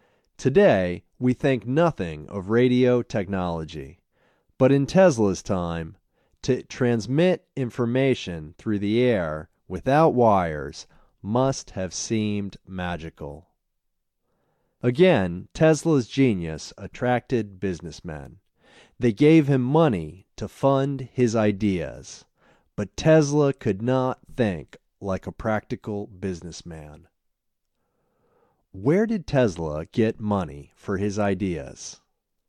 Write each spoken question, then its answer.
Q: Where did Tesla get money for his ideas?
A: Tesla got money for his ideas from businessmen.